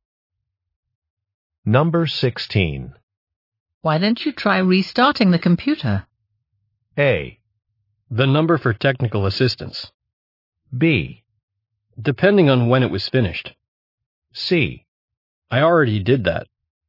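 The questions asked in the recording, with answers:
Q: Why don't you try restarting the computer?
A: C: I already did that.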